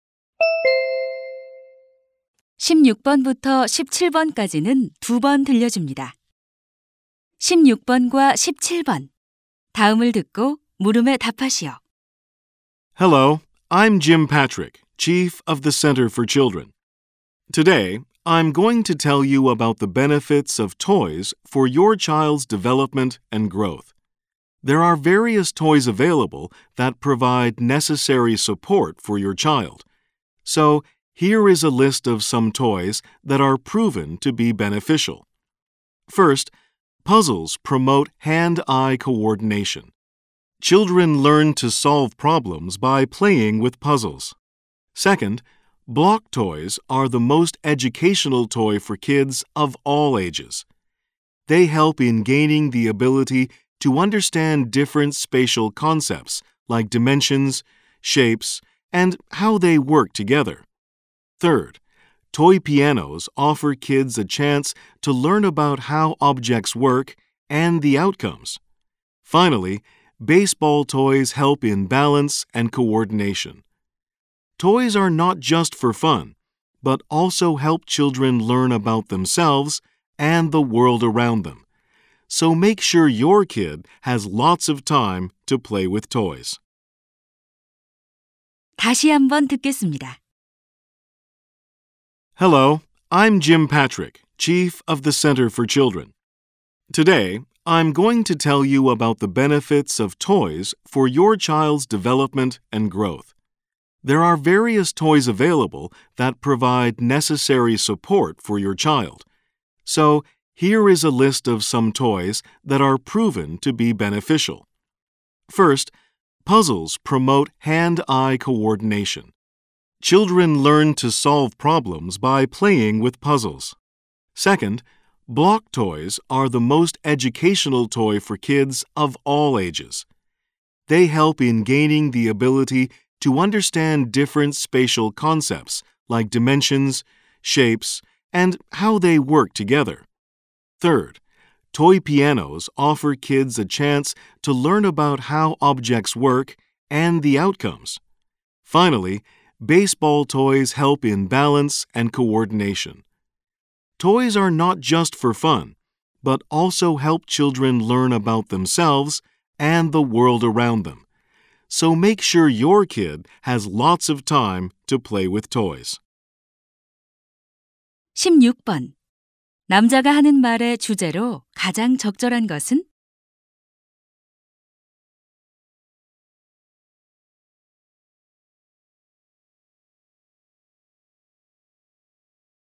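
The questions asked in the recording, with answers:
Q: 남자가 하는 말의 주제로 가장 적절한 것은?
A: 아이의 발달과 성장에 도움이 되는 장난감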